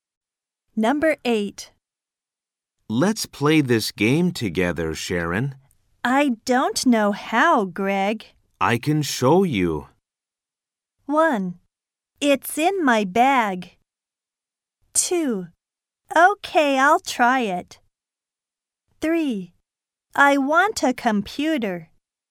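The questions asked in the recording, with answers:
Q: I can show you.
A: 2: Okay, I'll try it.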